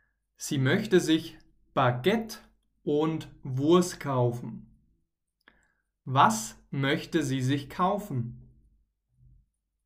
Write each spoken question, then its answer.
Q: Was möchte sie sich kaufen?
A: Baguette und Wurst. Sie möchte sich Baguette und Wurst kaufen.